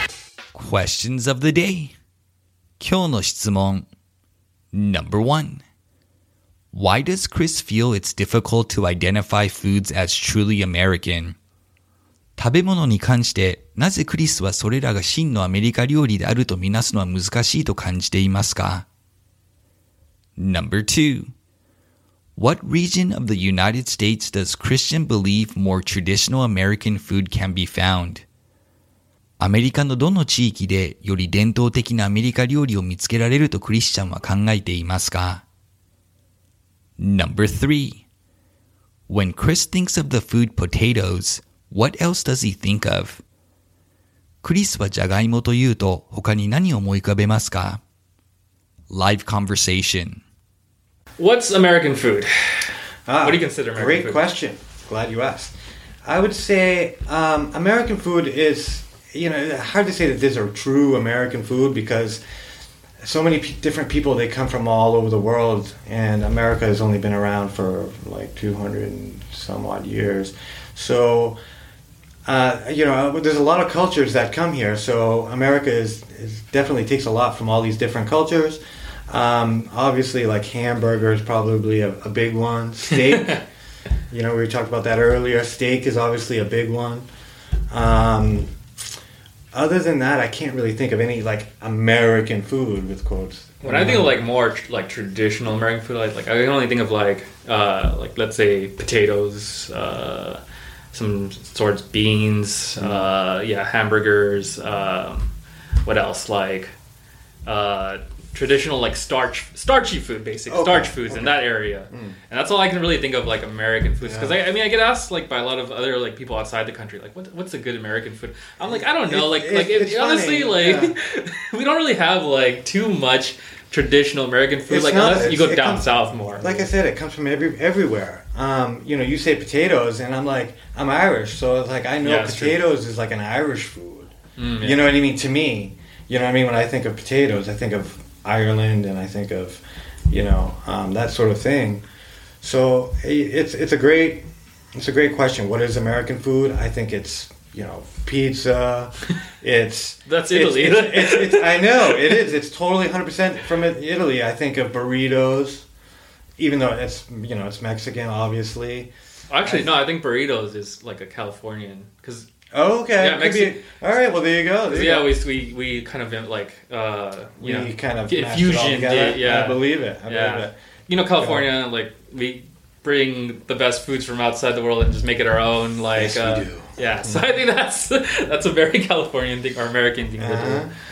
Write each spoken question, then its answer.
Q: Why does Chris feel it's difficult to identify foods as truly American?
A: Chris feels that because America has taken in people from all over the world, a lot of foods that are popular in America actually have origins outside of the country.

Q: What region of the United States does Christian believe more traditional American food can be found?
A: Christian feels the American South has some more traditional foods.

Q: When Chris thinks of the food potatoes, what else does he think of?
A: Chris thinks of Ireland whenever he thinks of potatoes, generally thinking of potatoes as an Irish food.